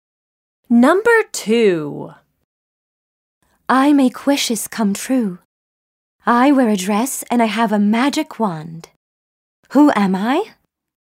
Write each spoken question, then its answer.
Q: Who am I?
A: I am the fairy.